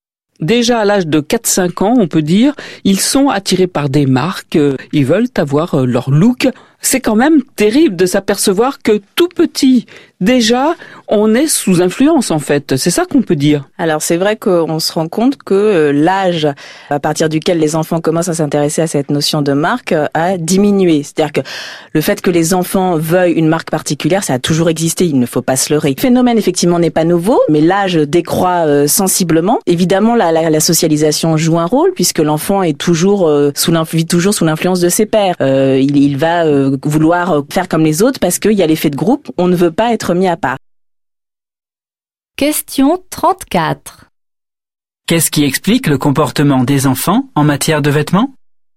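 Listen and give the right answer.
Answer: La socialisation : l'influence des pairs et l'effet de groupe (ils veulent faire comme les autres)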